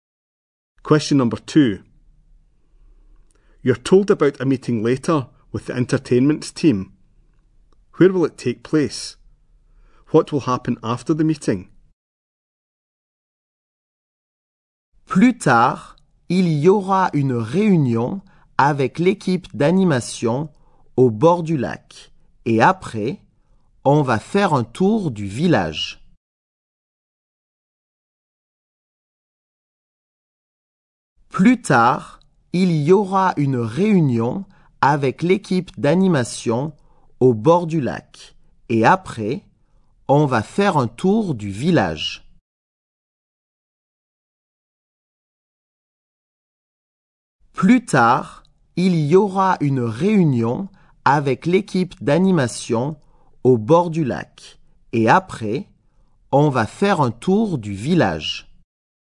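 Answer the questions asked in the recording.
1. By the lake
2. A tour of the village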